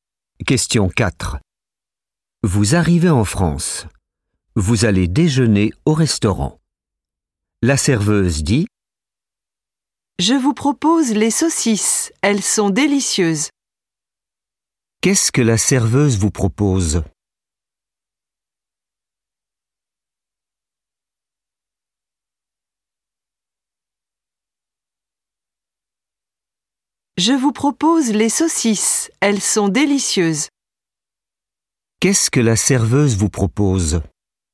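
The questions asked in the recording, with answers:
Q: Qu'est-ce que la serveuse vous propose ?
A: Les saucisses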